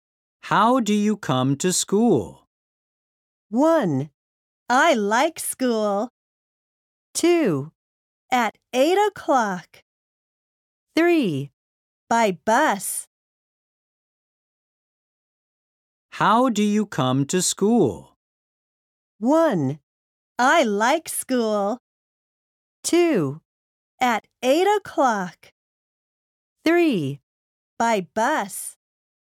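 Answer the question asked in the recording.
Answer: 3: By bus.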